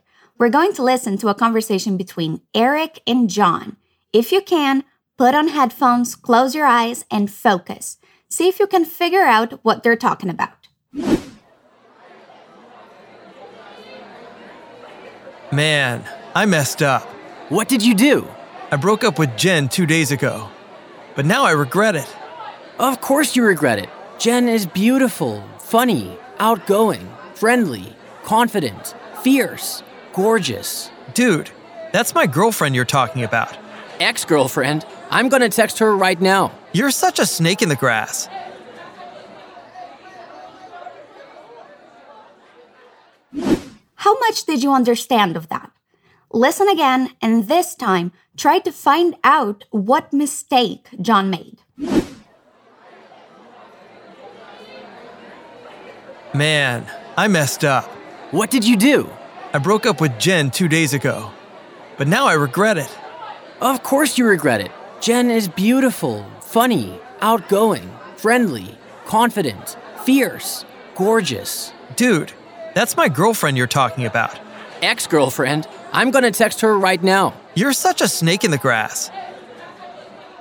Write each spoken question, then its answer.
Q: Listen again, and this time try to find out what mistake John made.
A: It seems like John ended a relationship and now he feels like he shouldn't have, that it was a mistake.